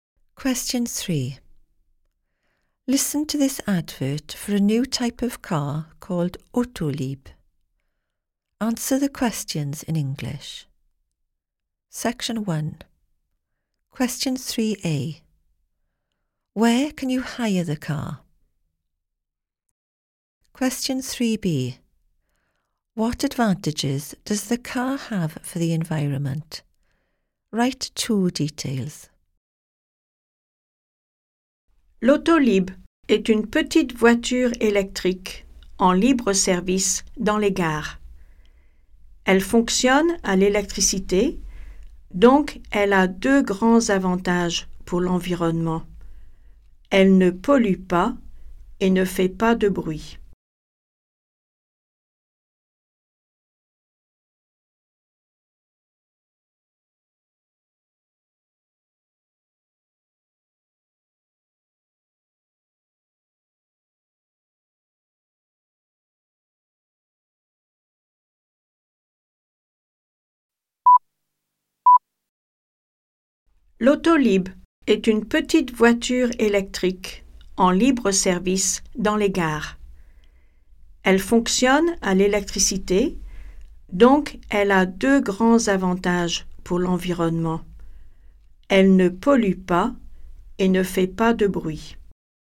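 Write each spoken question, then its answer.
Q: Where can you hire the car?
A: At railway stations

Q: What advantages does the car have for the environment?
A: It doesn't pollute and makes no noise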